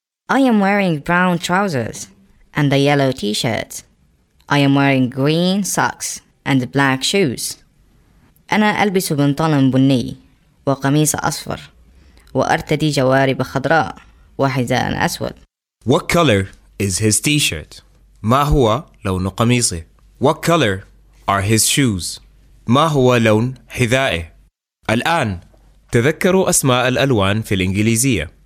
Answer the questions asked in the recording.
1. Yellow.
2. Black.